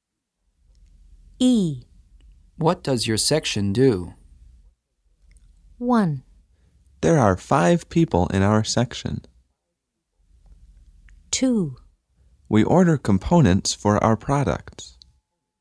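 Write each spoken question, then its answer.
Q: What does your section do?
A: 2: We order components for our products.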